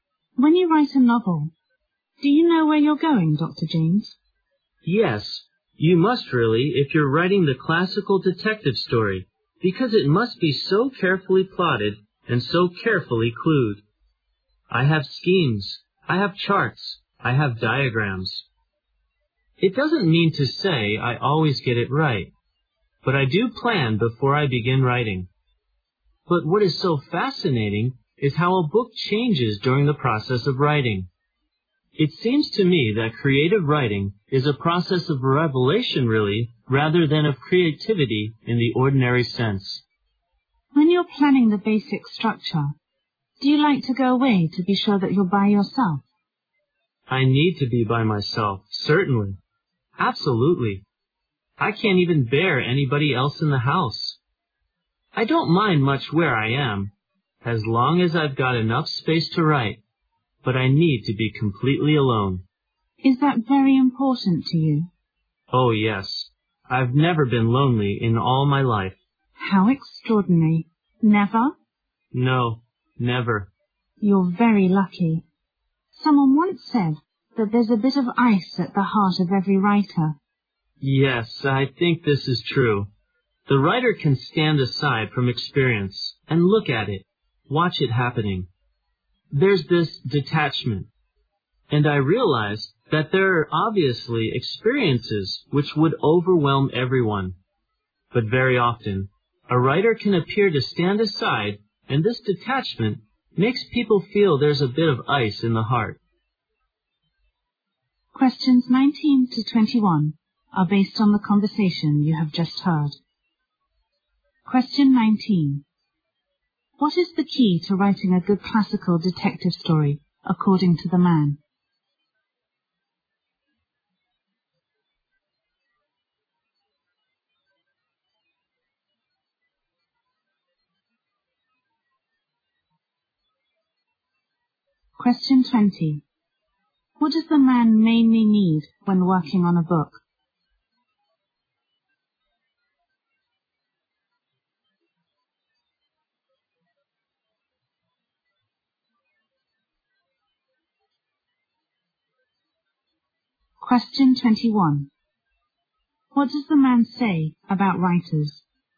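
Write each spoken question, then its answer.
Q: What is the key to writing a good classical detective story, according to the man?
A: Careful plotting and clueing.

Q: What does the man mainly need when working on a book?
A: To be completely alone.

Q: What does the man say about writers?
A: They can stand aside from experience with detachment.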